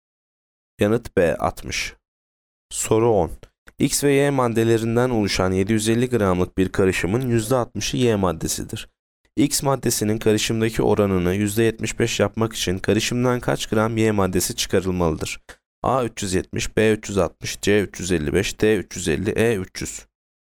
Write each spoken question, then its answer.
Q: X maddesinin karışımdaki oranını %75 yapmak için karışımdan kaç gram Y maddesi çıkarılmalıdır?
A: Yanıt D 350.